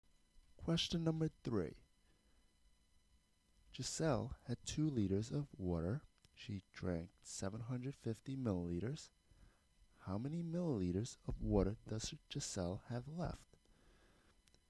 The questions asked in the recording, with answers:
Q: How many milliliters of water does Giselle have left?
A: we are left with 1,250, which is choice C.